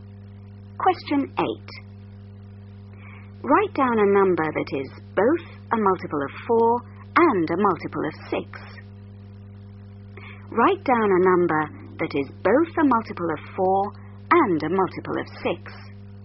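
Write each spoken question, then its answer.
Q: Write down a number that is both a multiple of 4 and a multiple of 6.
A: 12 (or any multiple of 12)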